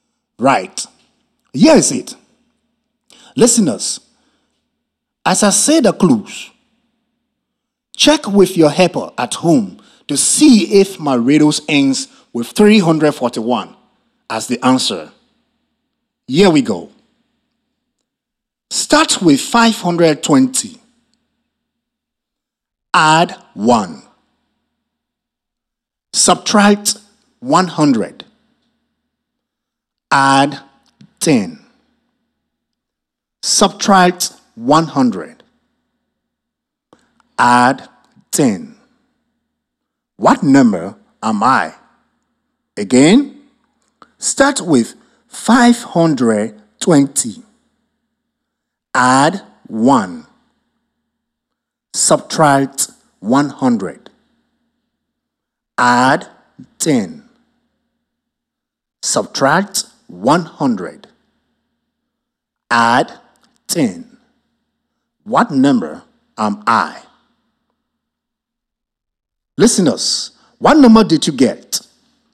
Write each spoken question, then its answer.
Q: Add 10. What number am I?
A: 341.